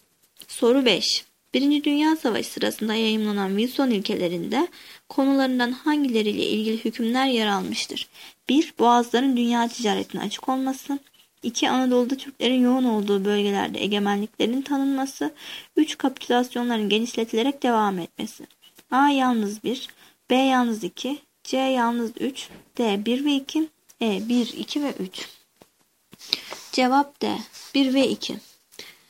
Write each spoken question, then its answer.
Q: Birinci Dünya Savaşı sırasında yayımlanan Wilson ilkelerinde konularından hangileriyle ilgili hükümler yer almıştır?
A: Cevap D. 1 ve 2.